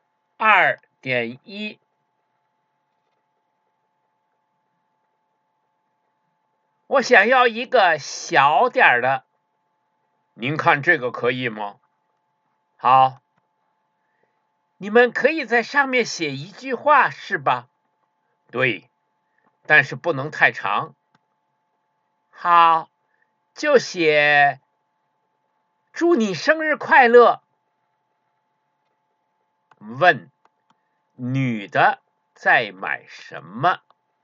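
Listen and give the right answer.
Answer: 生日蛋糕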